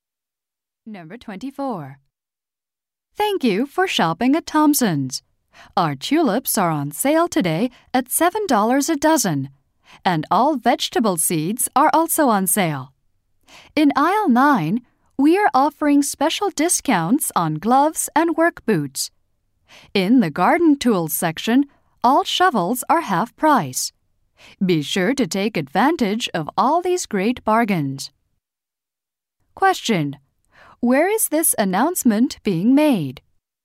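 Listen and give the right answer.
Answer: At a garden store.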